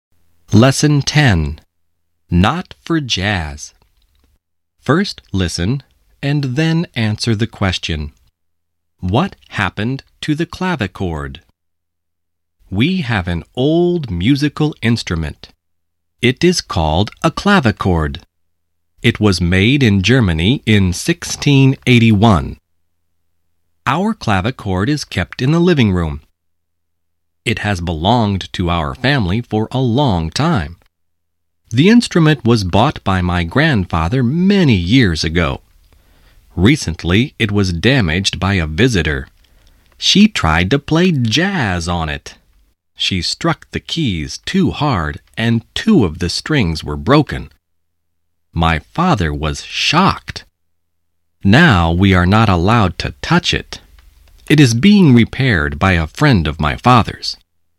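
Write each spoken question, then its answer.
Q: What happened to the clavichord?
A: It was damaged by a visitor who played jazz on it too hard and broke two strings; now it is being repaired.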